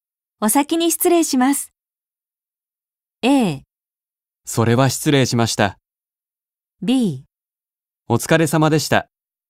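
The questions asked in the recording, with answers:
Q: お先に失礼します。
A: B: お疲れ様でした。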